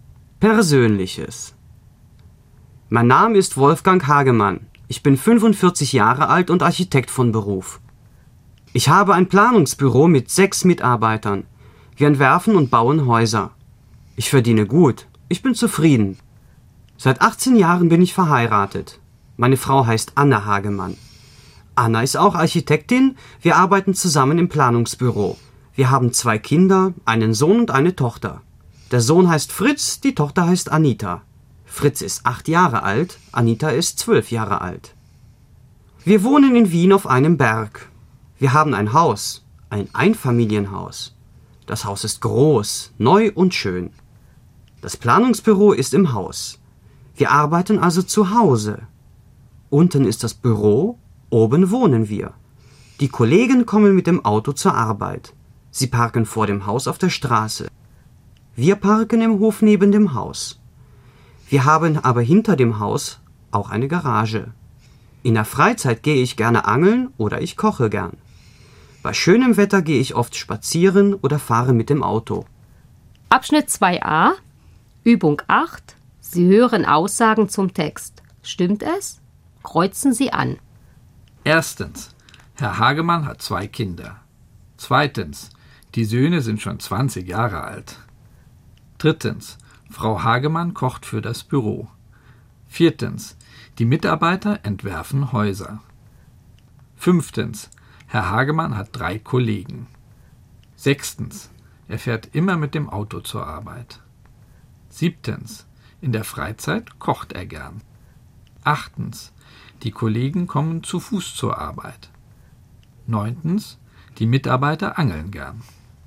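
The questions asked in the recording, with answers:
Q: Erstens, Herr Hagemann hat 2 Kinder.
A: Stimmt

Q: Zweitens, die Söhne sind schon 20 Jahre alt.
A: Stimmt nicht

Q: Drittens, Frau Hagemann kocht für das Büro.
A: Stimmt nicht

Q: Fünftens, Herr Hagemann hat 3 Kollegen.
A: Stimmt nicht

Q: Sechstens, er fährt immer mit dem Auto zur Arbeit.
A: Stimmt nicht

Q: Siebtens, in der Freizeit kocht er gern.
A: Stimmt

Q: Achtens, die Kollegen kommen zu Fuß zur Arbeit.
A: Stimmt nicht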